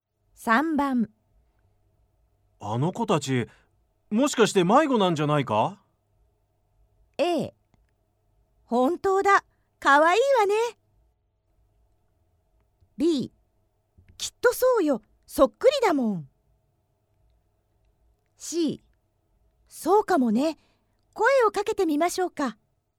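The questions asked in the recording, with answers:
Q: あの子たち、もしかして迷子なんじゃないか?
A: C: そうかもね、声をかけてみましょうか。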